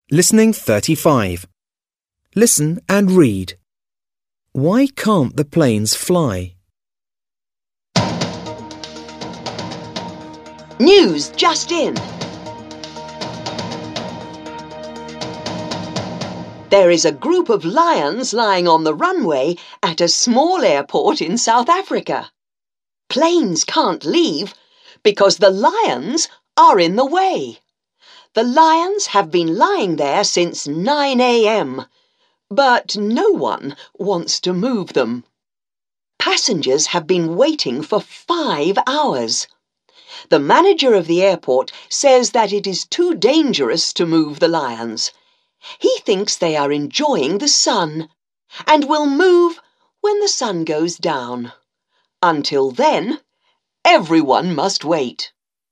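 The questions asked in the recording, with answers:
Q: Why can't the planes fly?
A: Because a group of lions is lying on the runway.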